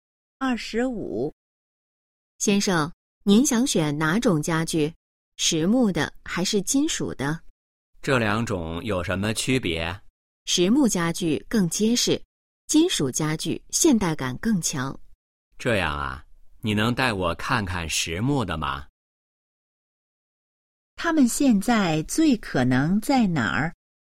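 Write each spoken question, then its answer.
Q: 他们现在最可能在哪儿?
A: 家具店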